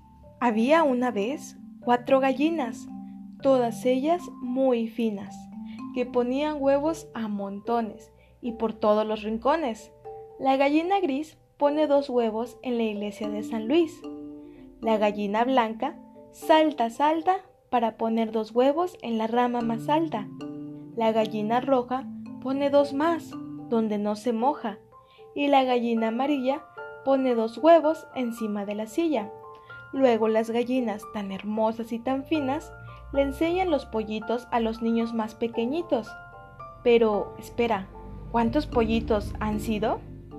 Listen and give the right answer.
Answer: 8 huevos. Muy bien, que al nacer se convierten en ocho hermosos pollitos.